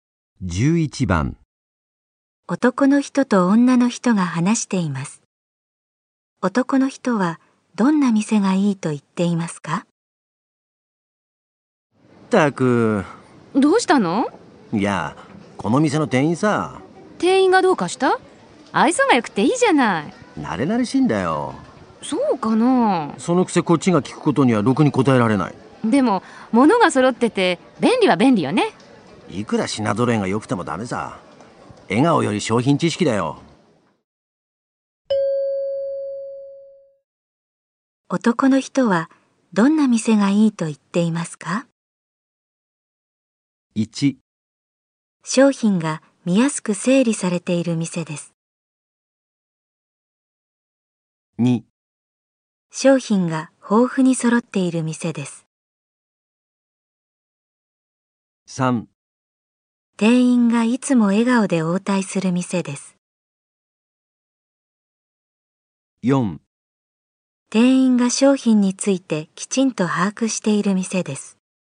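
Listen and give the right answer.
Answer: 4: 店員が商品についてきちんと把握している店です。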